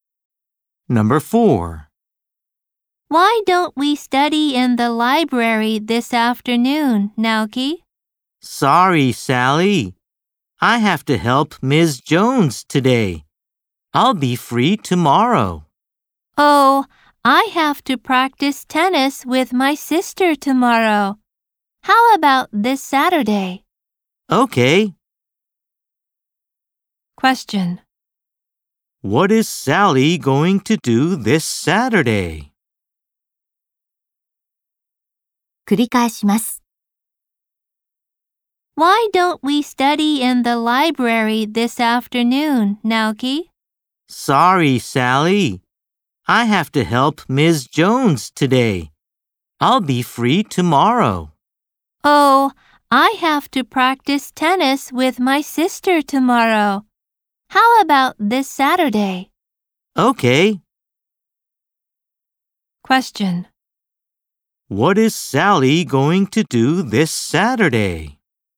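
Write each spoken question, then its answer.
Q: What is Sally going to do this Saturday?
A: Study in the library with Naoki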